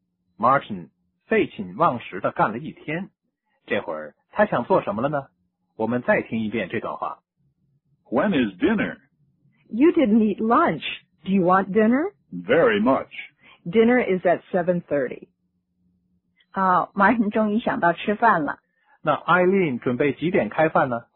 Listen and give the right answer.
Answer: 晚饭在7:30。